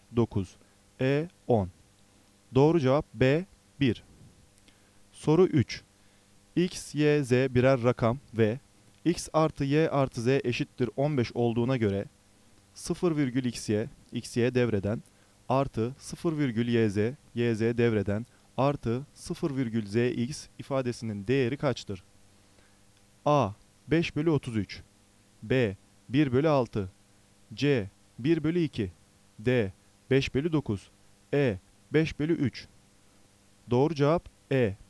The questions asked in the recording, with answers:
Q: X, Y, Z birer rakam ve X artı Y artı Z eşittir 15 olduğuna göre 0,xy, xy devreden artı 0,yz, yz devreden artı 0,zx ifadesinin değeri kaçtır?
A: Doğru cevap E.